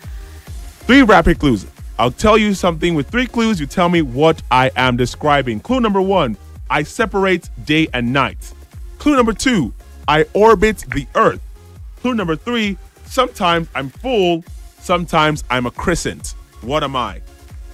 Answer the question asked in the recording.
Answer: The answer was the moon.